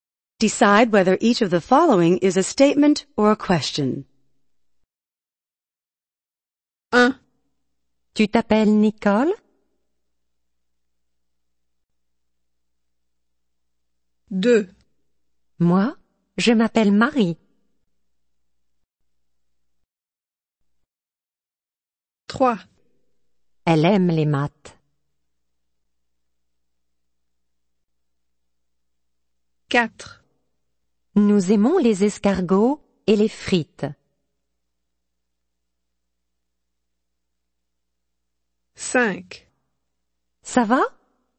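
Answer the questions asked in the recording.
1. question
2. statement
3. statement
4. statement
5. question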